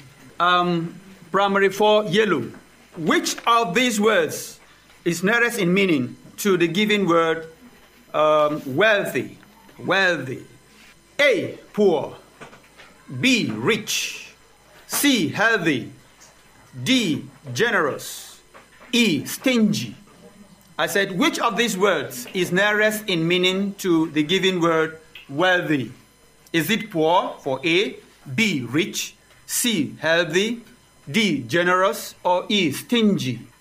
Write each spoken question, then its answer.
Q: Which of these words is nearest in meaning to the given word wealthy?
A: The answer is B, rich.